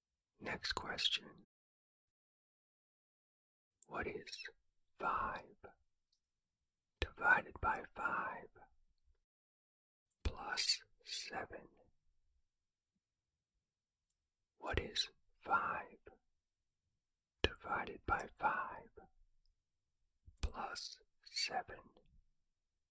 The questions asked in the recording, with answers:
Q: What is 5 divided by 5 plus 7?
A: The answer is 8.